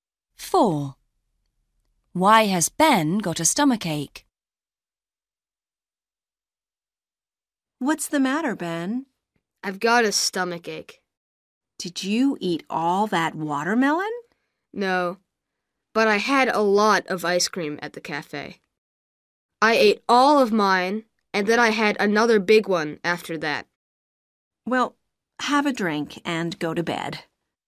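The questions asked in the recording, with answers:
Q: Why has Ben got a stomachache?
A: He ate a lot of ice cream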